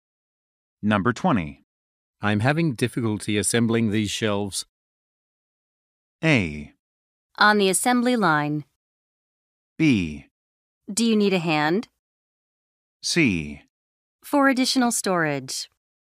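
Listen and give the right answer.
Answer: B: Do you need a hand?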